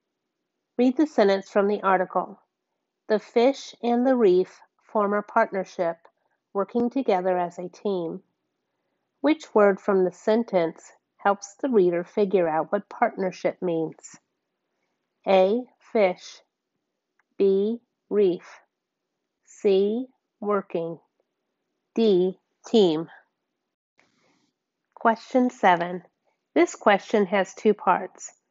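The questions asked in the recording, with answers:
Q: Which word from the sentence helps the reader figure out what partnership means?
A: D: Team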